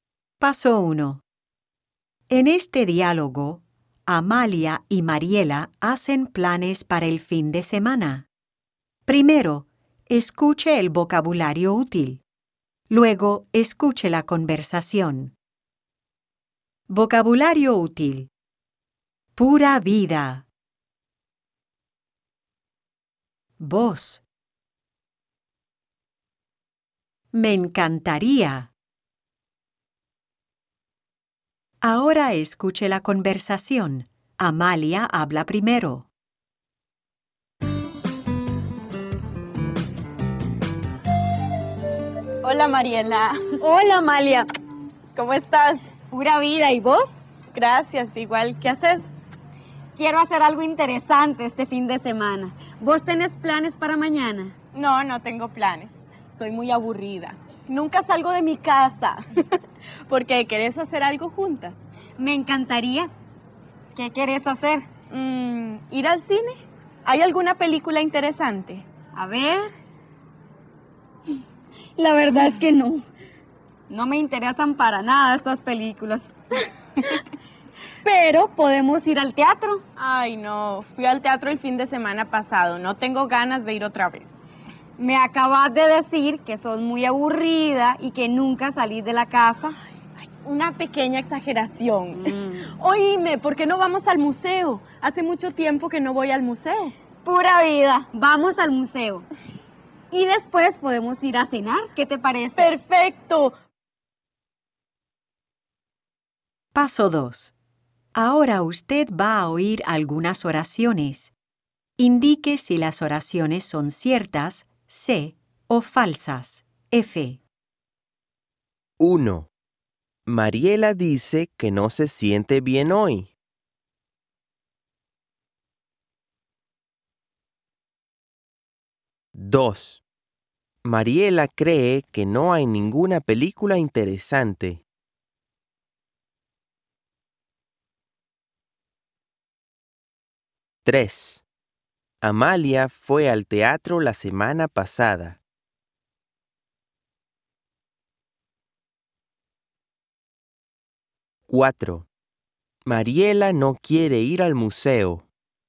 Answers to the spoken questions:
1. 1. Falso.
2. 2. Cierto.
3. 3. Cierto.
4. 4. Falso.